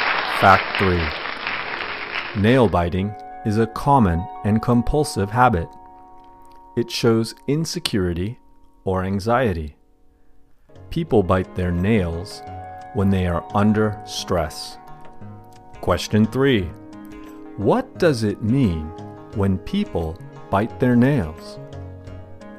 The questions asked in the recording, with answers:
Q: What does it mean when people bite their nails?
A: People bite their nails when they are nervous and under stress.